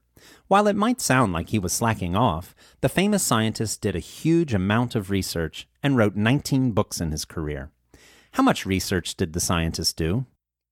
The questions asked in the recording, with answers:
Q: How much research did the scientist do?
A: The scientist did a huge amount of research.